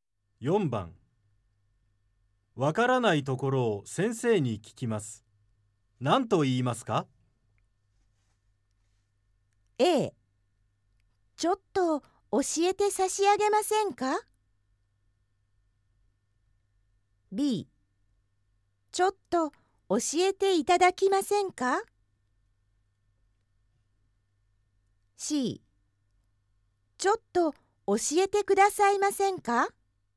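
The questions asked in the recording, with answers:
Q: わからないところを先生に聞きます。何と言いますか?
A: C: ちょっと教えてくださいませんか?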